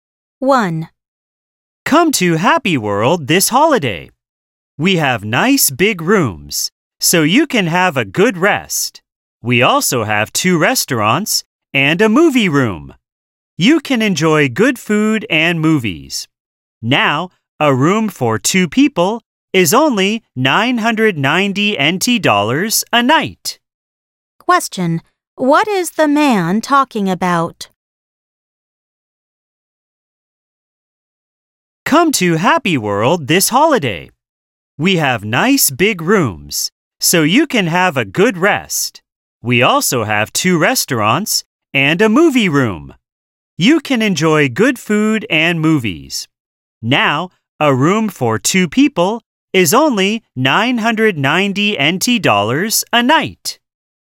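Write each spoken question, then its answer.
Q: Question, what is the man talking about?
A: A hotel (Happy World) and its rooms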